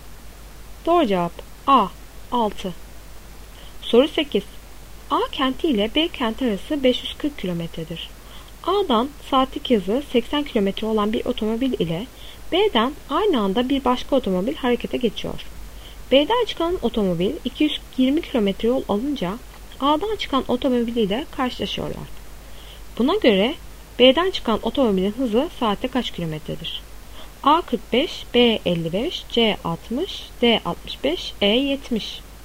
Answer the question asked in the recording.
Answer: Doğru cevap B 55.